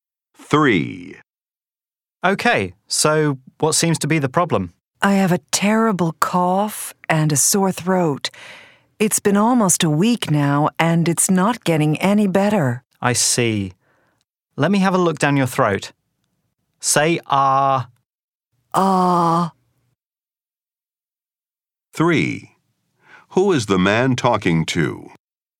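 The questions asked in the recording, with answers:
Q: Who is the man talking to?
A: A doctor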